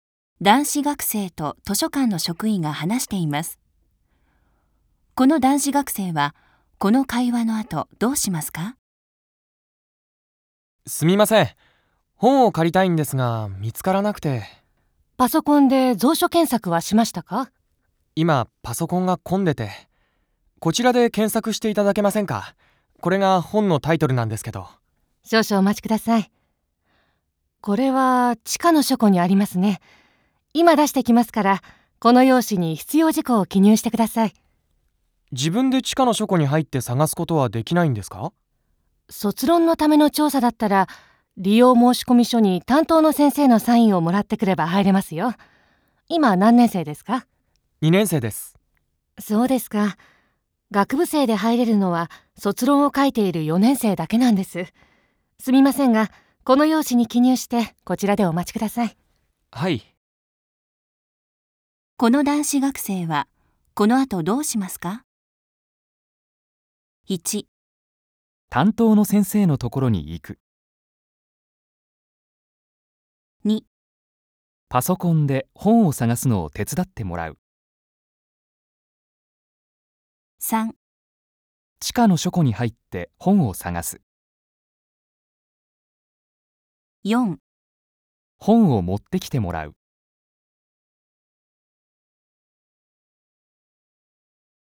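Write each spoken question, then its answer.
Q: この男子学生はこの後どうしますか?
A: 4: 本を持ってきてもらう。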